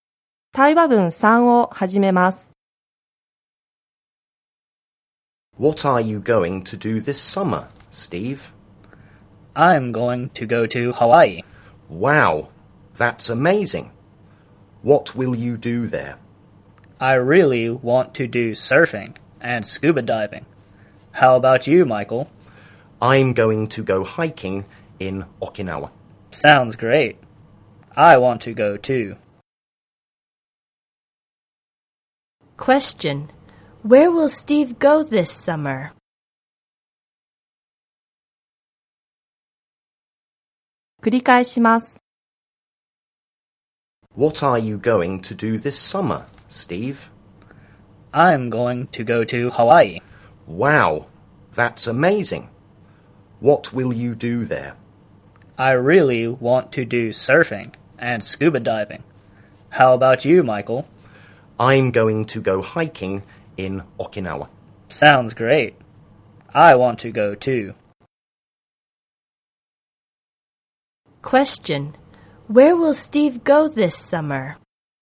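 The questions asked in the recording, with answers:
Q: Where will Steve go this summer?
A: Hawaii.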